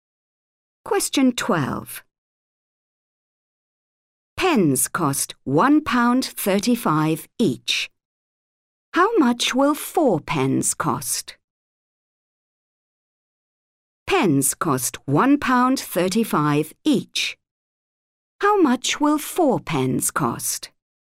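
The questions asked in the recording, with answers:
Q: Pens cost £1.35 each. How much will 4 pens cost?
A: £5.40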